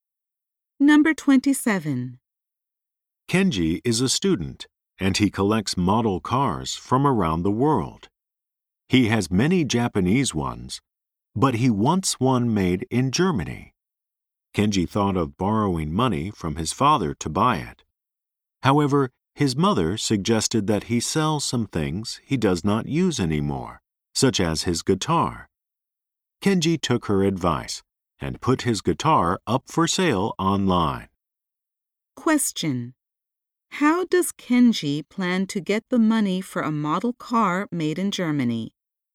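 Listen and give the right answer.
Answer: By selling his guitar online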